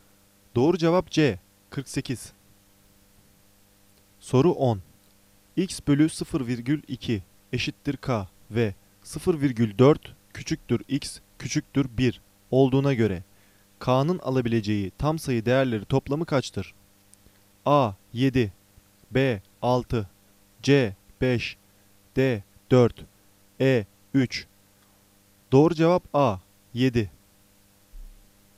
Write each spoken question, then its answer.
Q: X bölü 0,2 eşittir K ve 0,4 küçüktür X küçüktür 1 olduğuna göre K'nın alabileceği tam sayı değerleri toplamı kaçtır?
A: Doğru cevap A 7.